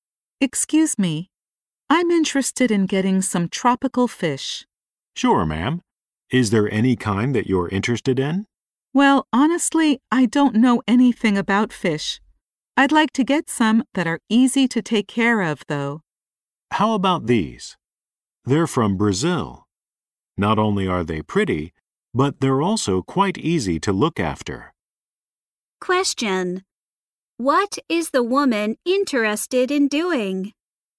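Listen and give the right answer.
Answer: Getting some tropical fish that are easy to take care of.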